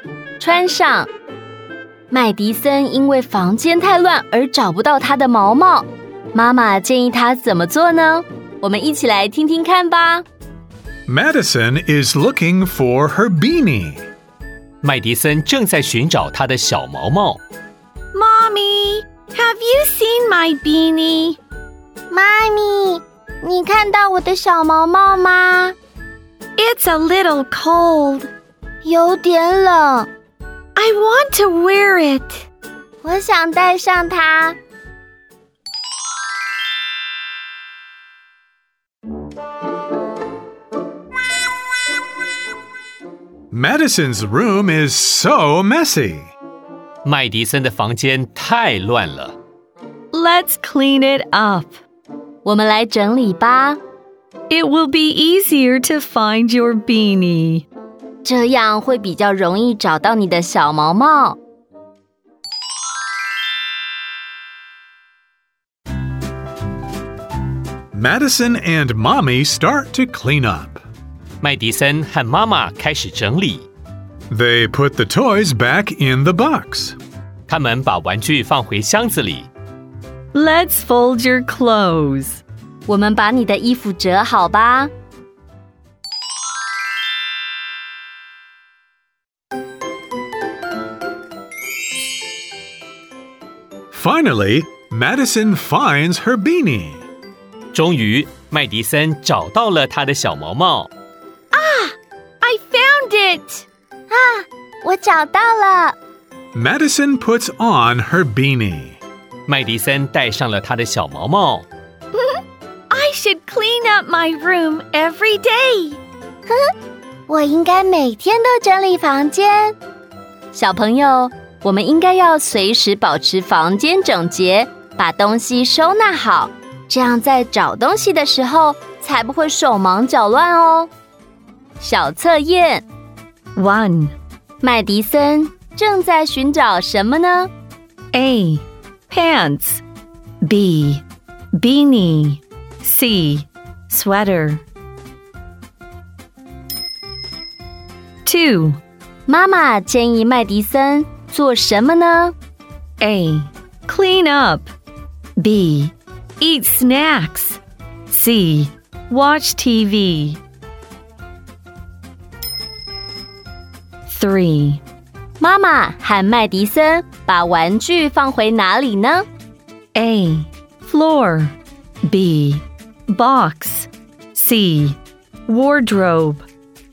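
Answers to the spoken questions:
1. B: Beanie
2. A: Clean up
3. B: Box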